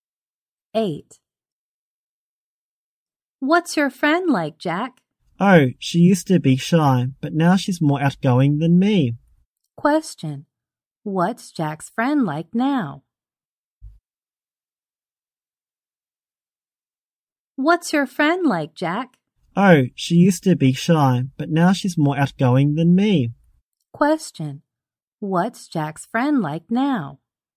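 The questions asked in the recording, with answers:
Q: What's Jack's friend like now?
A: Outgoing.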